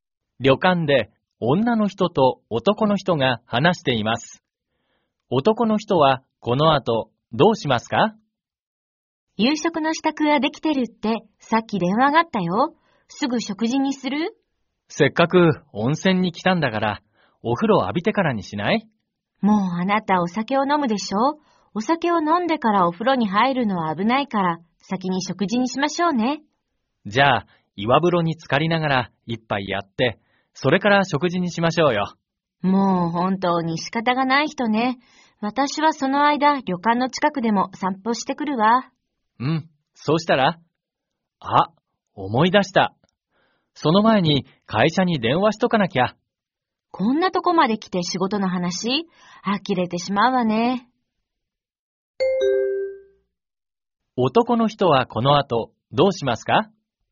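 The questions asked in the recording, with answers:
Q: 男の人はこの後どうしますか?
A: 会社に電話する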